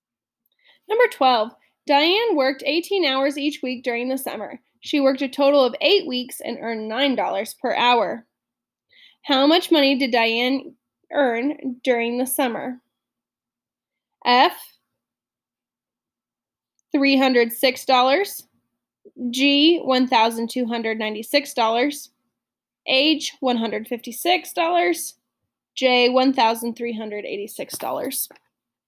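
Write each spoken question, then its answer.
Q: How much money did Diane earn during the summer?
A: G: $1,296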